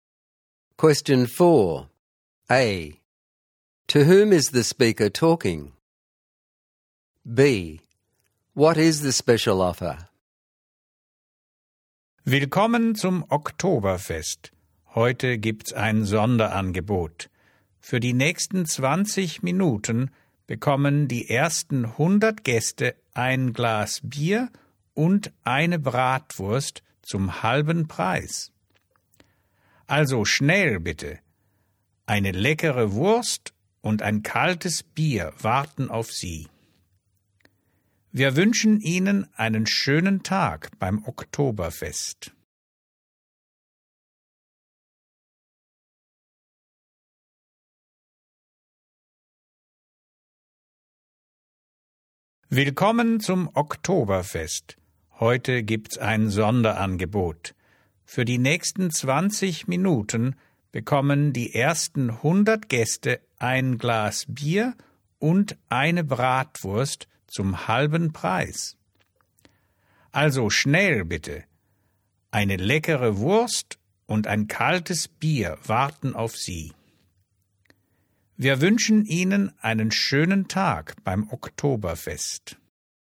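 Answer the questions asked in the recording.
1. Guests/visitors at the Oktoberfest
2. For the next 20 minutes the first 100 guests get a glass of beer and a bratwurst at half price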